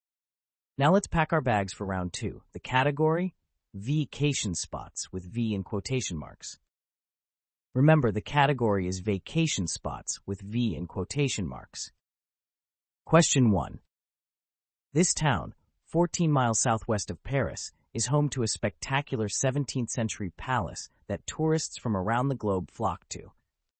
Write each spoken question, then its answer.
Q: This town, 14 miles southwest of Paris, is home to a spectacular 17th-century palace that tourists from around the globe flock to.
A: The answer is Versailles.